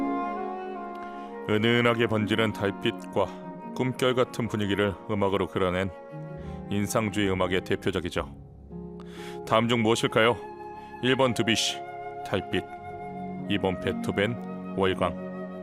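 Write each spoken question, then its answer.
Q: 다음 중 무엇일까요? 1번 드뷔시, 달빛. 2번 베토벤, 월광.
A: 1: 드뷔시, 달빛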